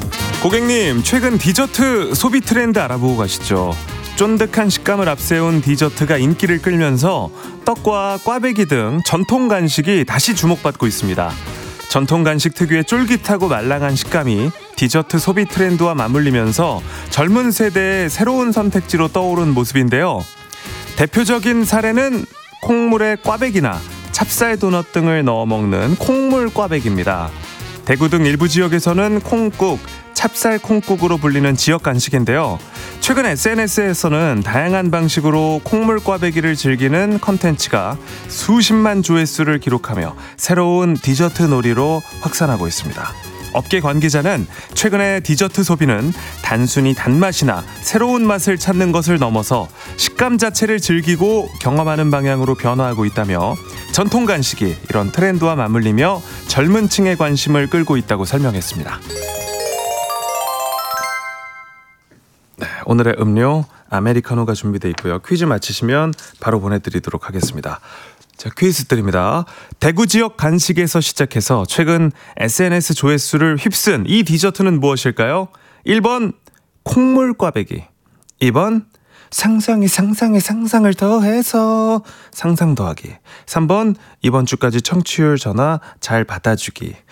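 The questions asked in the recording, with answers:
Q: 대구 지역 간식에서 시작해서 최근 SNS 조회수를 휩쓴 이 디저트는 무엇일까요?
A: 1: 콩물 꽈배기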